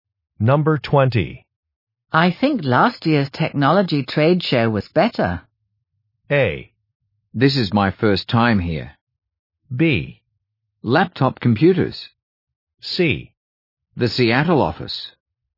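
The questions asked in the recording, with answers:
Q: I think last year's technology trade show was better.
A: A: This is my first time here.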